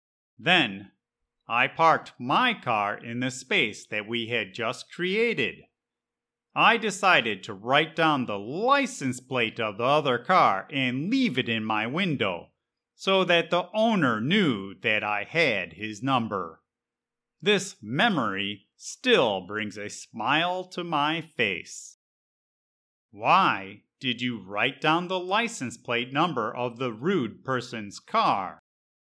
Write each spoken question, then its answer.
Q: Why did you write down the license plate number of the rude person's car?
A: I wrote down the license plate number of the car and put it in my window where everyone could see it so that the owner of the car would think twice before messing with my car.